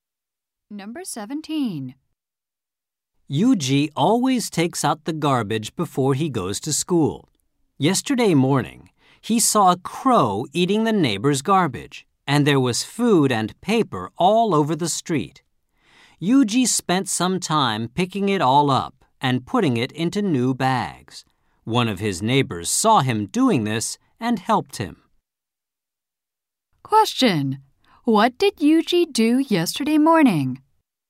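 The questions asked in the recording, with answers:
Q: What did Yuji do yesterday morning?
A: Picked up garbage a crow had scattered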